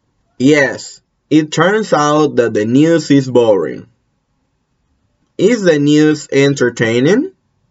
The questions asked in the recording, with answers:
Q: Is the news entertaining?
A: No, no. It turns out that the news is boring.